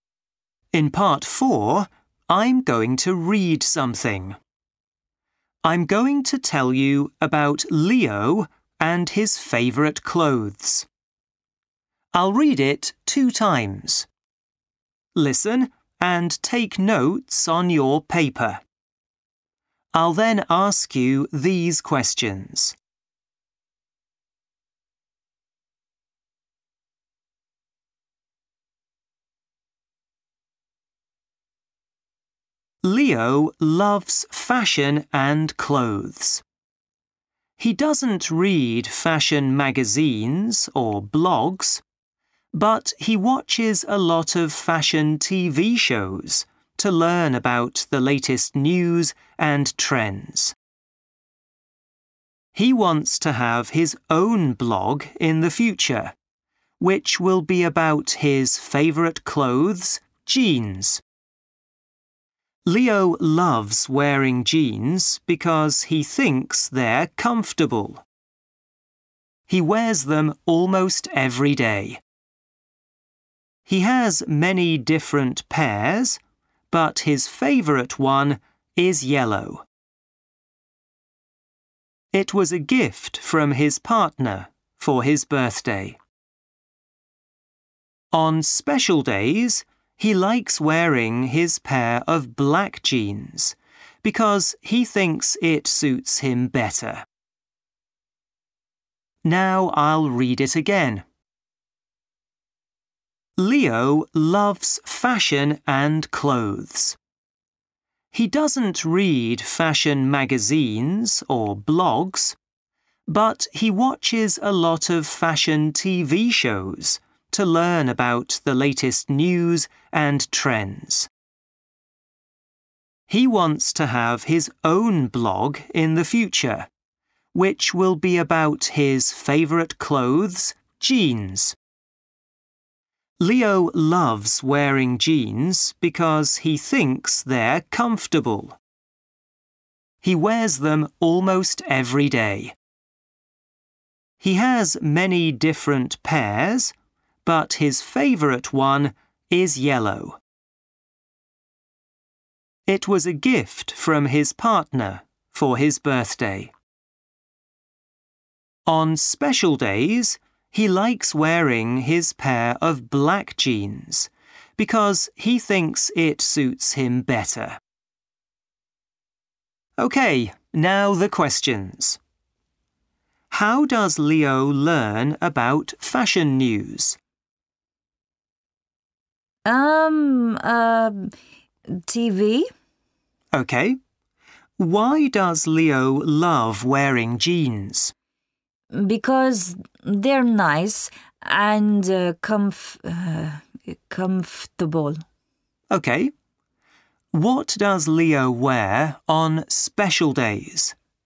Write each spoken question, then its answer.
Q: How does Leo learn about fashion news?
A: TV.

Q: What does Leo wear on special days?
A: Jeans, black jeans.